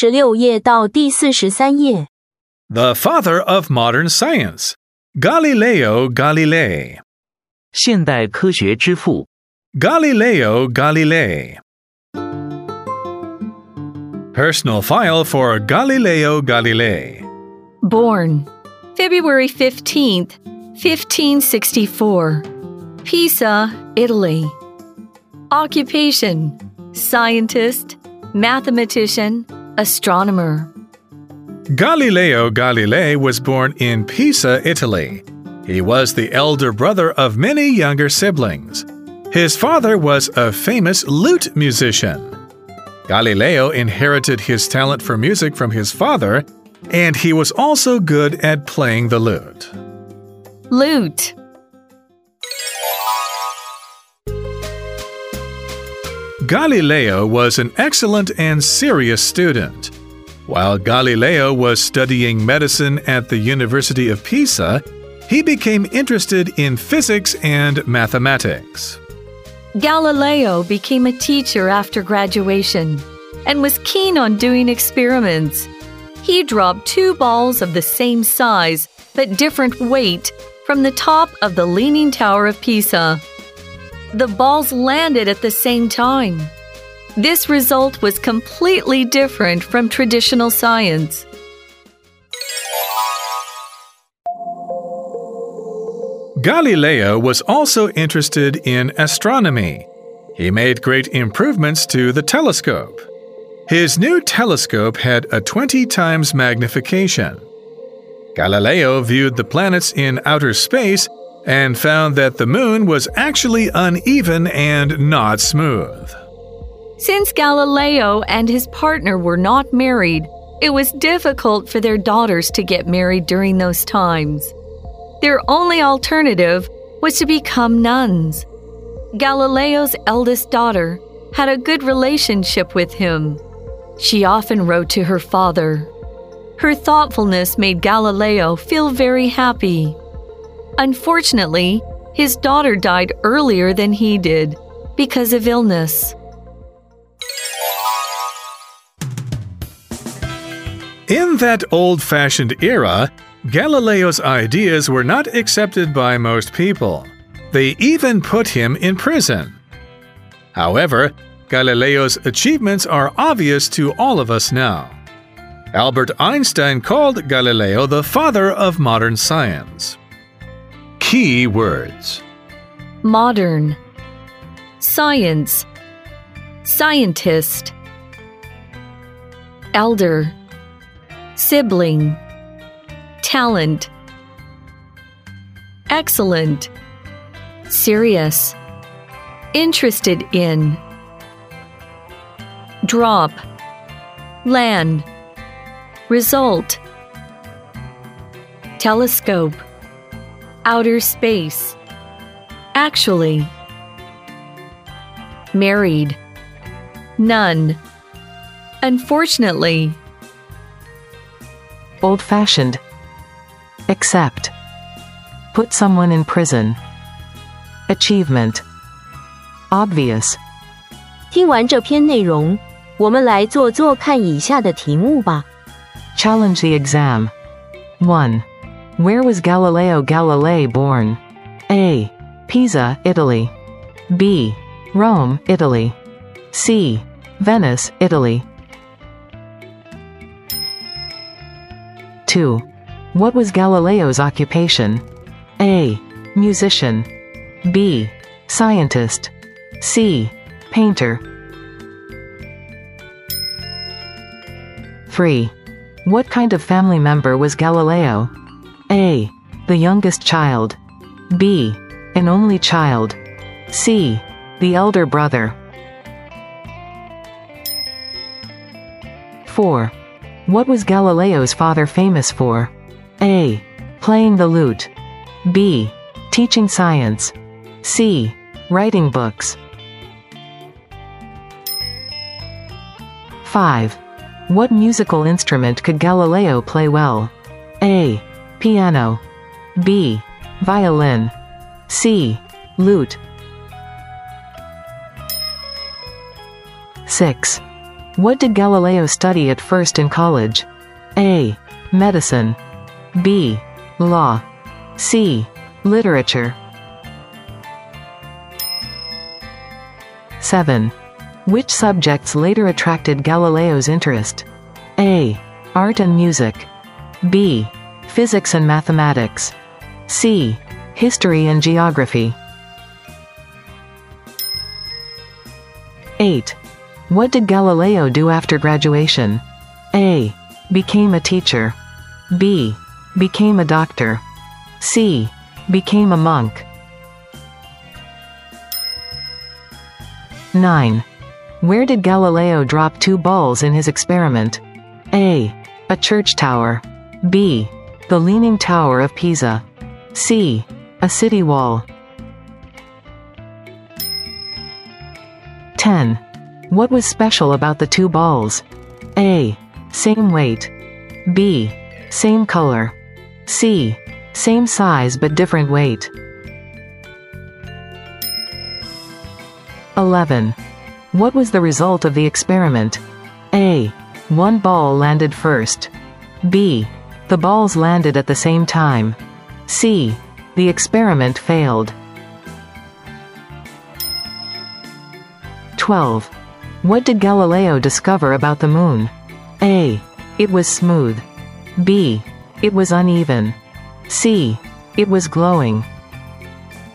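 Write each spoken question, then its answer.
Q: Where was Galileo Galilei born?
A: A: Pisa, Italy.

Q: What was Galileo's occupation?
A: B: Scientist.

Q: What kind of family member was Galileo?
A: C: The elder brother.

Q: What was Galileo's father famous for?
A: A: Playing the lute.

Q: What musical instrument could Galileo play well?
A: C: Lute.

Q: What did Galileo study at first in college?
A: A: Medicine.

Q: Which subjects later attracted Galileo's interest?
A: B: Physics and mathematics.

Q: What did Galileo do after graduation?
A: A: Became a teacher.

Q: Where did Galileo drop two balls in his experiment?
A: B: The Leaning Tower of Pisa.

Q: What was special about the two balls?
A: C: Same size but different weight.

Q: What was the result of the experiment?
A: B: The balls landed at the same time.

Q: What did Galileo discover about the moon?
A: B: It was uneven.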